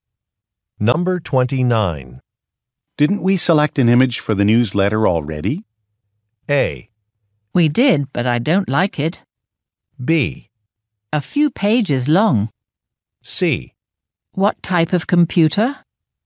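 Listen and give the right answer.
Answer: A: We did, but I don't like it.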